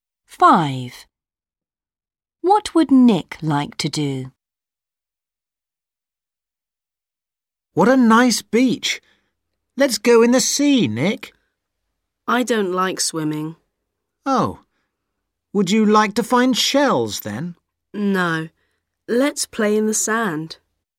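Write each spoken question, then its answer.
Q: What would Nick like to do?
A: play in the sand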